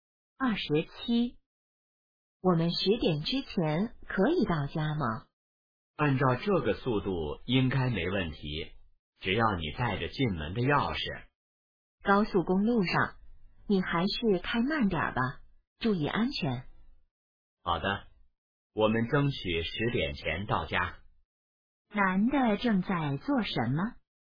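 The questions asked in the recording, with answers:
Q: 男的正在做什么?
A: 开车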